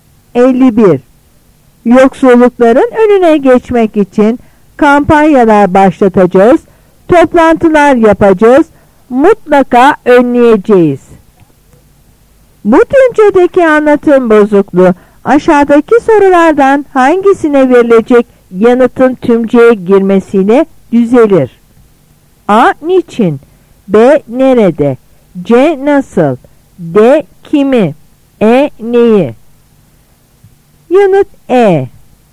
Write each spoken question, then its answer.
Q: Bu tümcedeki anlatım bozukluğu aşağıdaki sorulardan hangisine verilecek yanıtın tümceye girmesiyle düzelir?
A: Yanıt E.